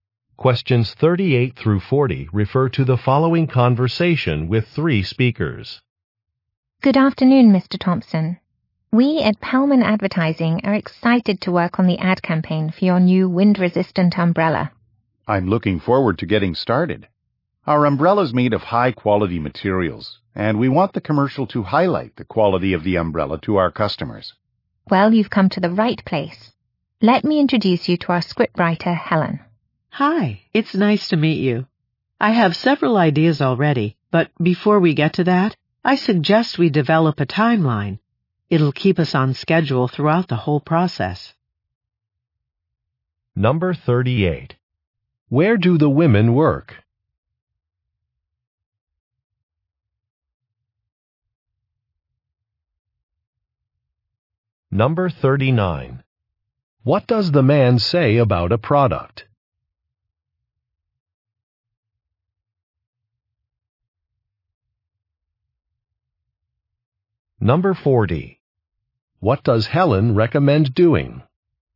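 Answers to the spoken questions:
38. At an advertising agency
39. It is made of high-quality materials
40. Developing a timeline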